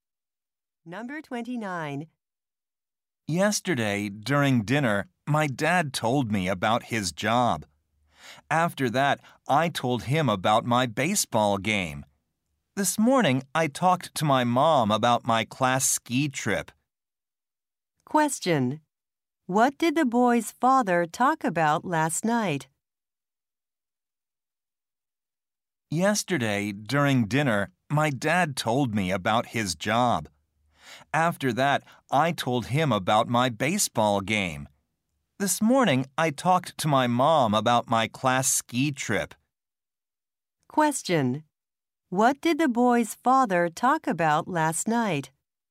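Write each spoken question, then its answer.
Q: What did the boy's father talk about last night?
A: His job.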